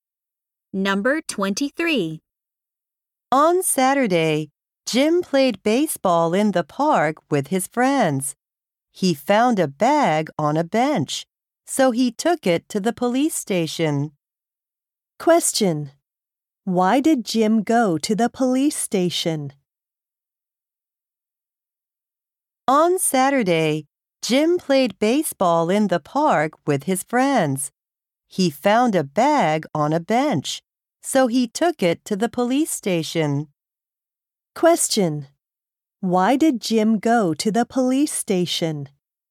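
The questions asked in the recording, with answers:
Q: Why did Jim go to the police station?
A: He found a bag on a bench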